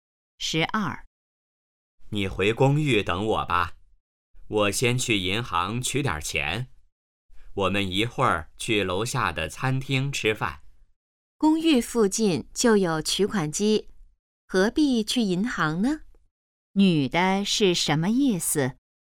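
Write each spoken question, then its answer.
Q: 女的是什么意思?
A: 不必去银行,公寓附近有取款机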